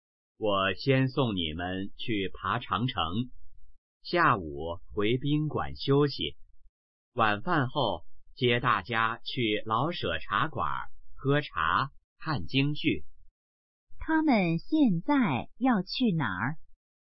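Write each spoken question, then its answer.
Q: 他们现在要去哪儿?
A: 爬长城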